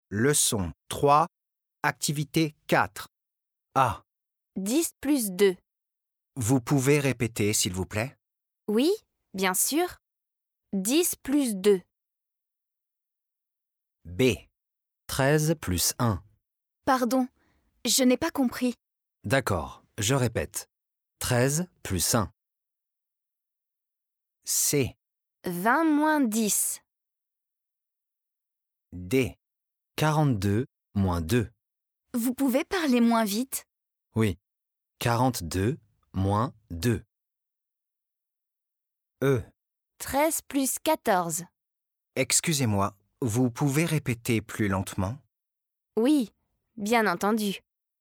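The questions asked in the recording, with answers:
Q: 10 plus 2.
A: 12 (douze)

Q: 13 plus 1.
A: 14 (quatorze)

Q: 20 moins 10.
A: 10 (dix)

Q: 42 moins 2.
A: 40 (quarante)

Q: 13 plus 14.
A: 27 (vingt-sept)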